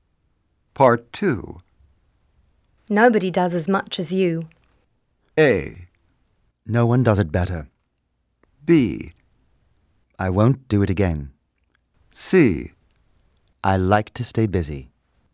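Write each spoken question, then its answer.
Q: Nobody does as much as you.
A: C: I like to stay busy.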